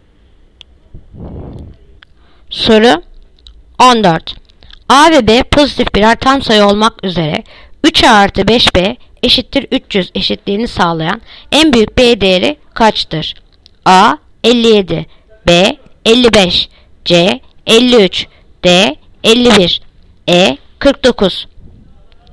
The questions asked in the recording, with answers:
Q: A ve B pozitif birer tam sayı olmak üzere 3A artı 5B eşittir 300 eşitliğini sağlayan en büyük B değeri kaçtır?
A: Yanıt Adana 57.